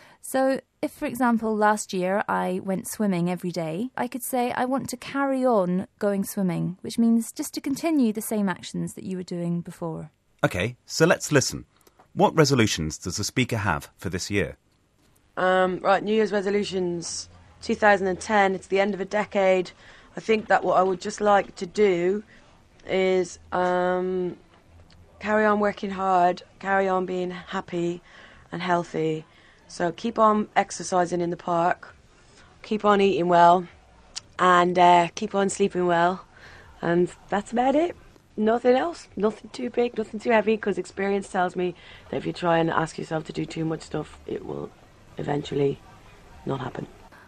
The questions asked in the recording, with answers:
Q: What resolutions does the speaker have for this year?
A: she wants to carry on or continue what she's already been doing